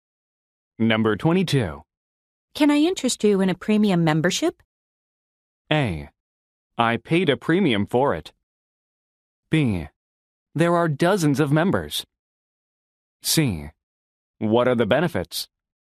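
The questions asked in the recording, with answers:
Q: Can I interest you in a premium membership?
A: C: What are the benefits?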